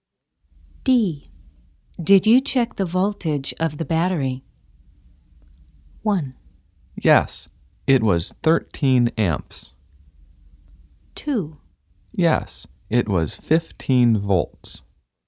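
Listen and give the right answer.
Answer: 2: Yes, it was 15 volts.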